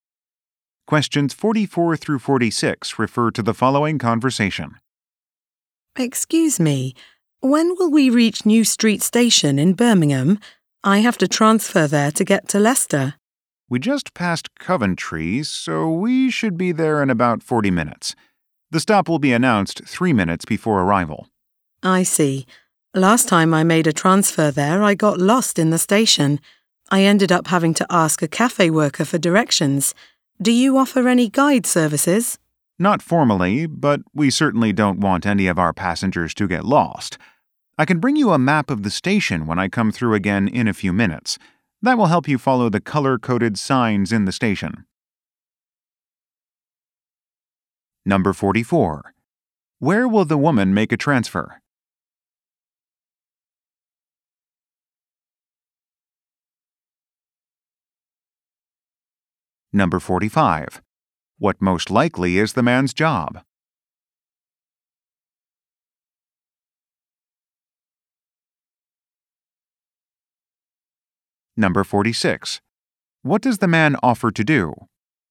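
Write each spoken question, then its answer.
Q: Where will the woman make a transfer?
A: New Street Station in Birmingham

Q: What does the man offer to do?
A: Bring her a map of the station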